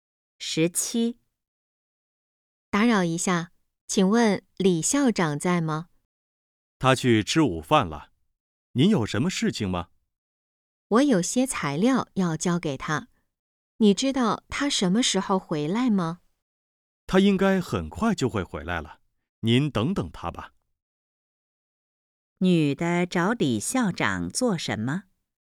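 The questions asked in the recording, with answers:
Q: 女的找李校长做什么?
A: 交材料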